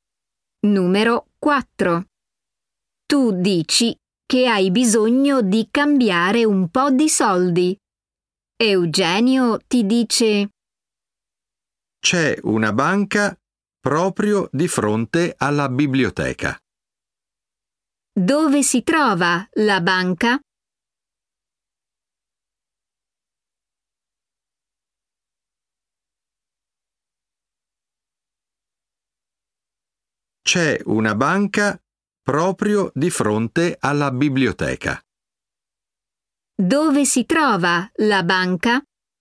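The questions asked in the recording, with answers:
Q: Dove si trova la banca?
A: proprio di fronte alla biblioteca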